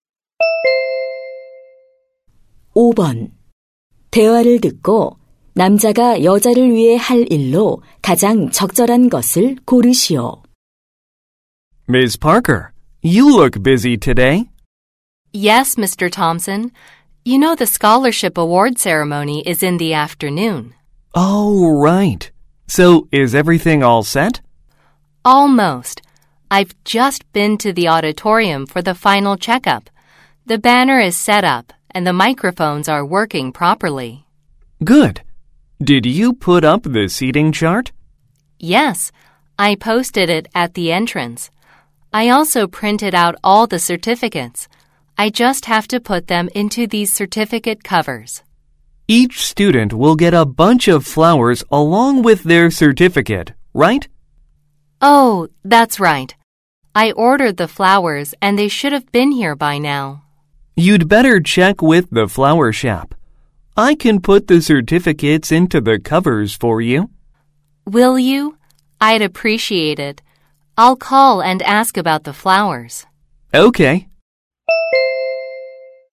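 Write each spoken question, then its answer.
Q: 대화를 듣고 남자가 여자를 위해 할 일로 가장 적절한 것을 고르시오.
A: 수료증을 커버에 넣기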